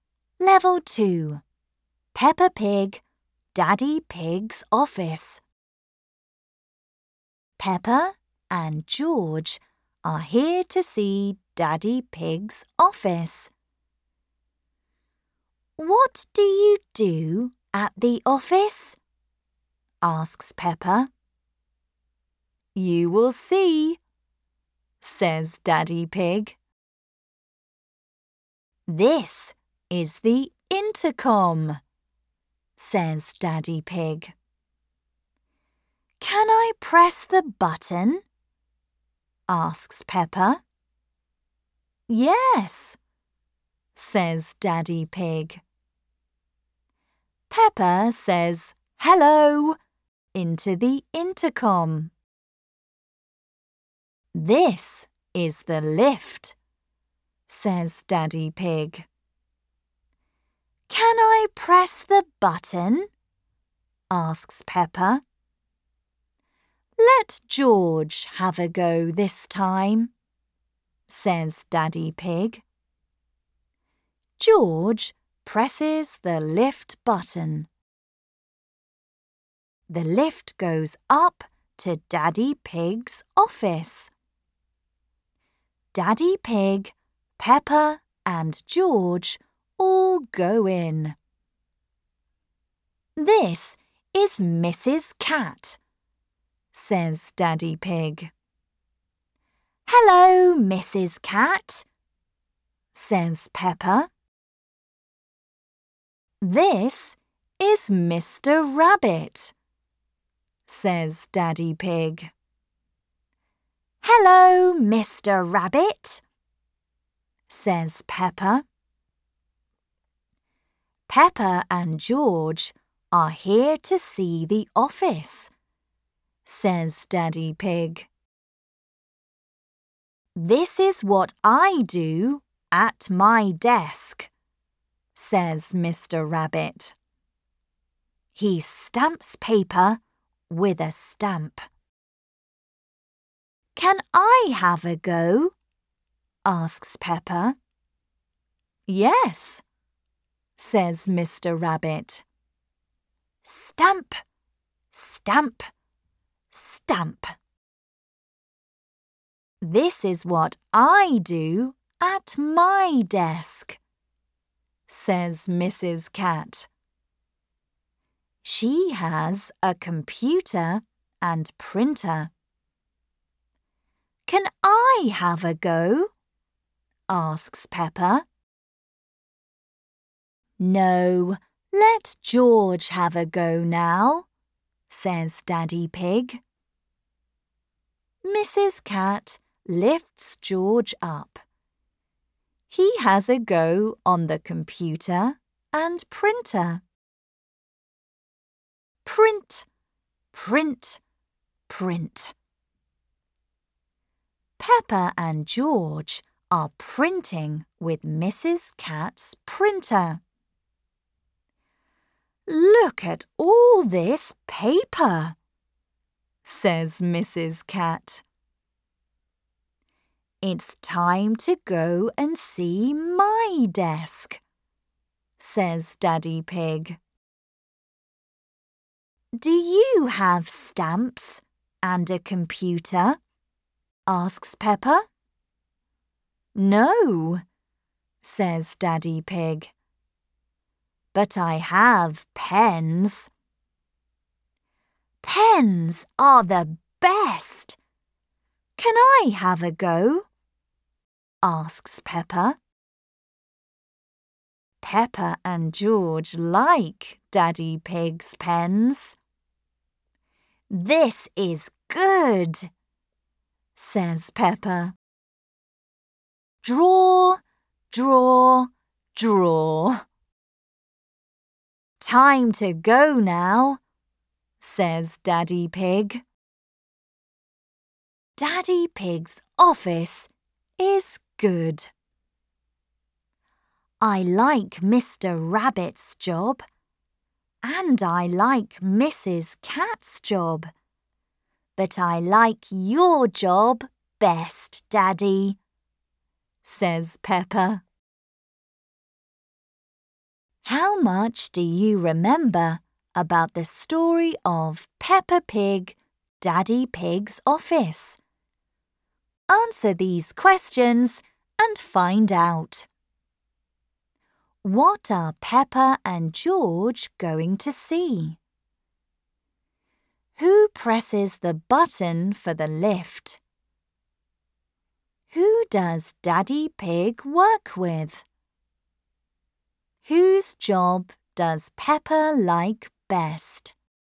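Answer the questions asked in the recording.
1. Daddy Pig's office
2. George
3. Mrs. Cat and Mr. Rabbit
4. Daddy Pig's job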